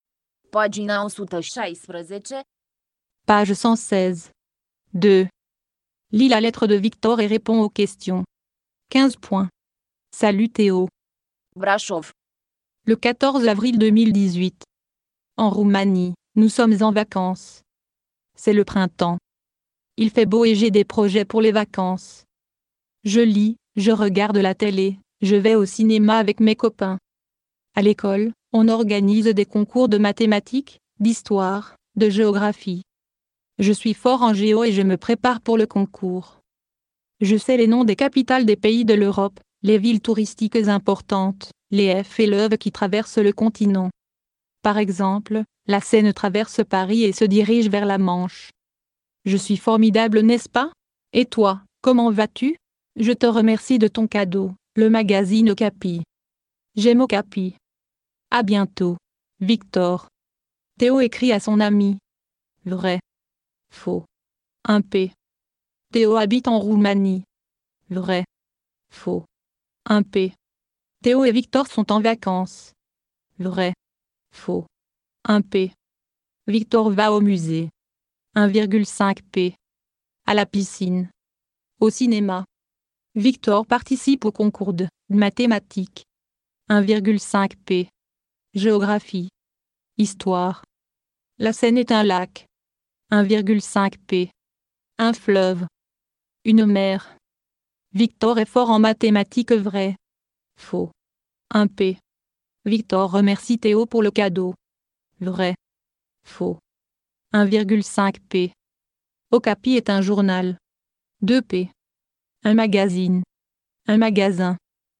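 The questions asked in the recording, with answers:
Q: Théo écrit à son ami.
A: Faux

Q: Victor va au musée.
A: Faux, il va au cinéma

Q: Victor participe au concours de mathématiques.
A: Faux, de géographie

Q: La Seine est un lac.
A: Faux, un fleuve

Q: Victor est fort en mathématiques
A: Faux

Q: Victor remercie Théo pour le cadeau.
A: Vrai

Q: Okapi est un journal.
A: Faux, un magazine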